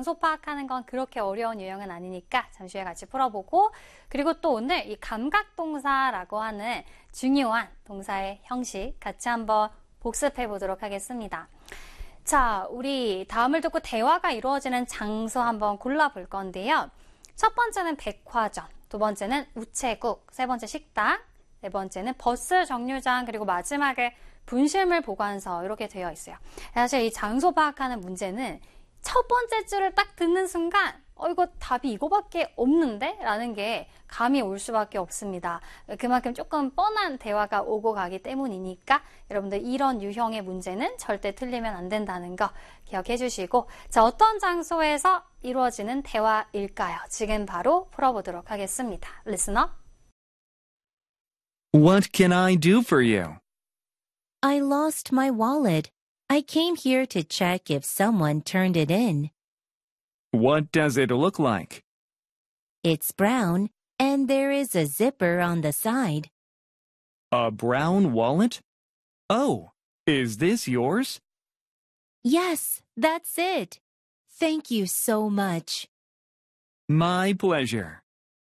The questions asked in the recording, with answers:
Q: 다음을 듣고 대화가 이루어지는 장소 한번 골라볼 건데요.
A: 분실물 보관소가 되겠고요.